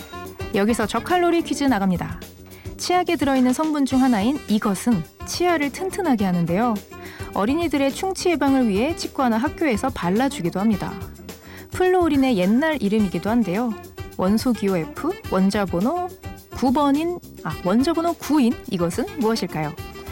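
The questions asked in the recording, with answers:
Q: 원소기호 F, 원자번호 9인 이것은 무엇일까요?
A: 불소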